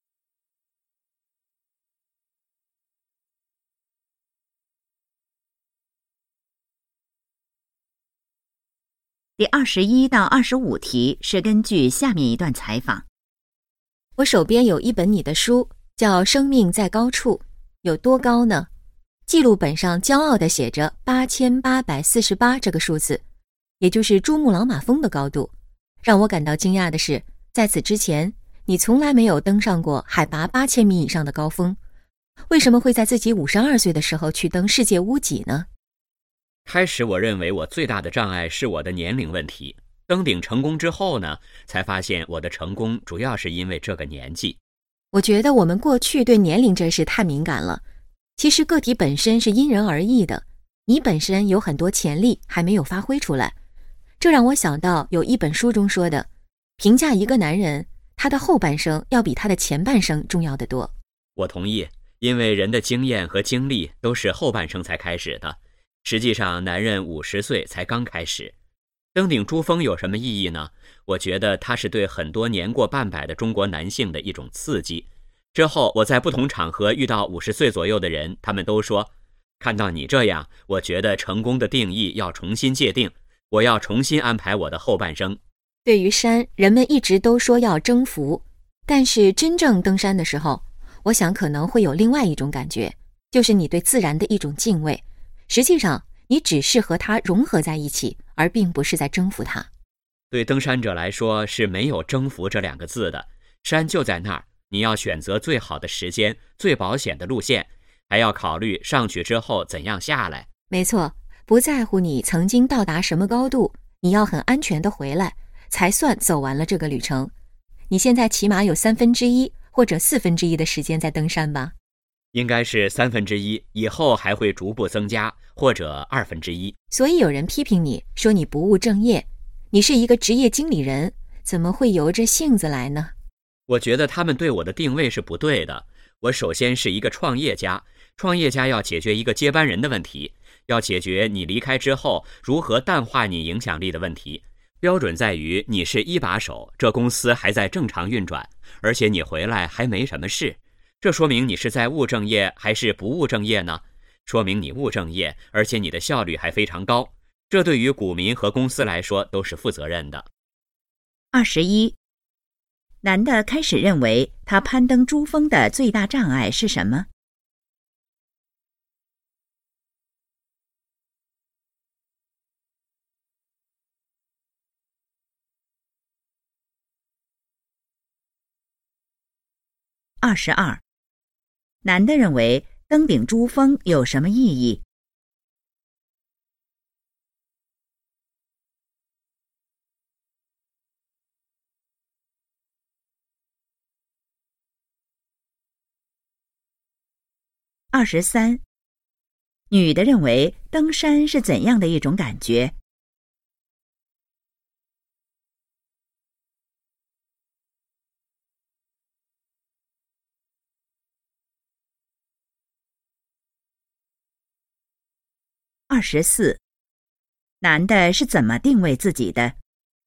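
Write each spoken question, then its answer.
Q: 男的开始认为他攀登珠峰的最大障碍是什么?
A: 年龄

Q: 男的认为登顶珠峰有什么意义?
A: 对年过半百的中国男性是一种刺激

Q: 女的认为登山是怎样的一种感觉?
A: 对自然的敬畏,与山融合而不是征服

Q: 男的是怎么定位自己的?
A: 创业家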